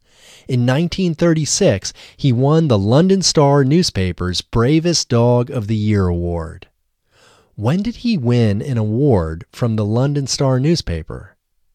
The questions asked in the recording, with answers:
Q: When did he win an award from the London Star newspaper?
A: He won an award from the London Star newspaper in 1936.